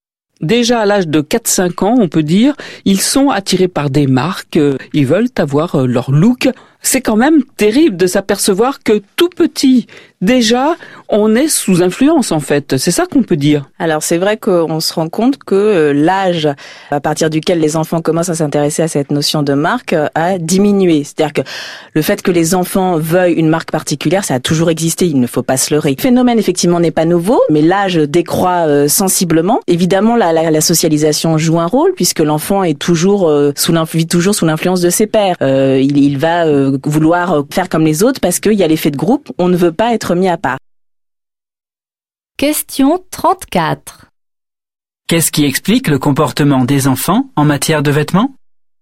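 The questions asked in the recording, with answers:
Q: Qu'est-ce qui explique le comportement des enfants en matière de vêtements ?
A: La socialisation : l'influence des pairs et l'effet de groupe (ils veulent faire comme les autres)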